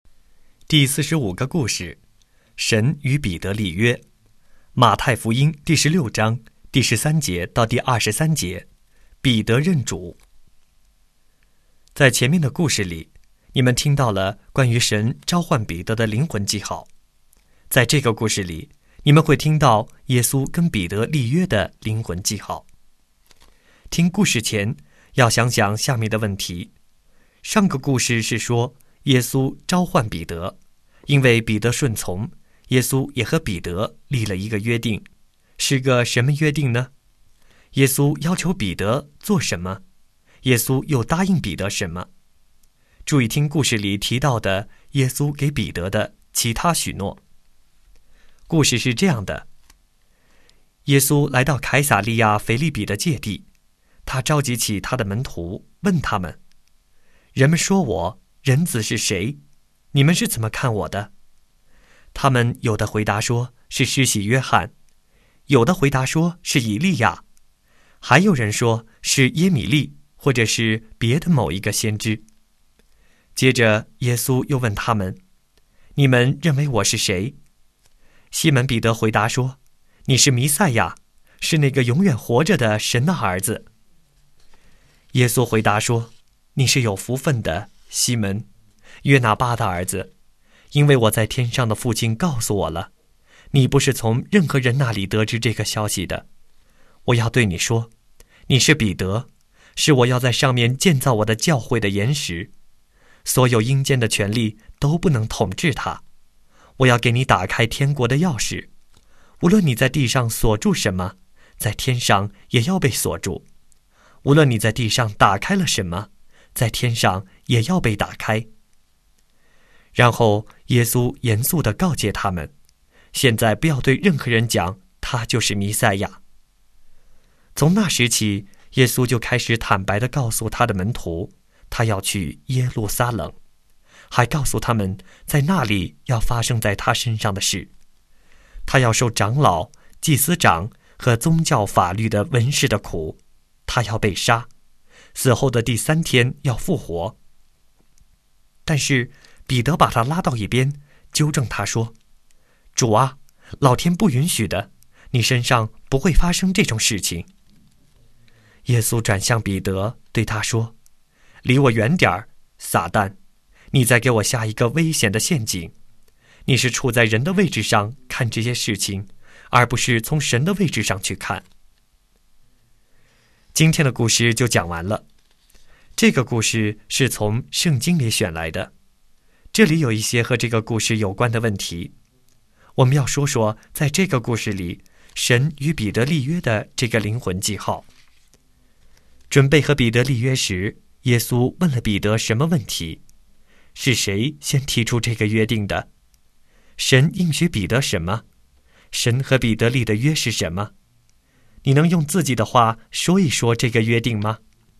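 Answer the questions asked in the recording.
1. 你们认为我是谁?
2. 要在他这块岩石上建造教会,阴间的权力不能统治它,并给他天国的钥匙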